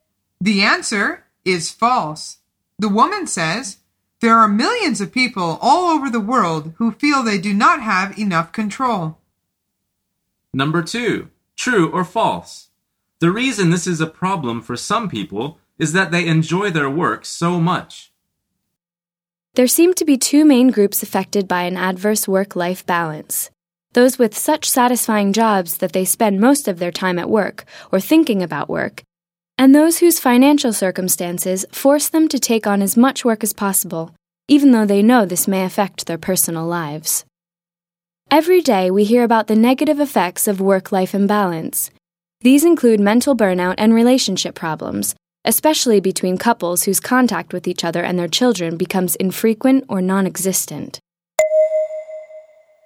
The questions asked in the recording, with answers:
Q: The reason this is a problem for some people is that they enjoy their work so much.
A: The answer is true.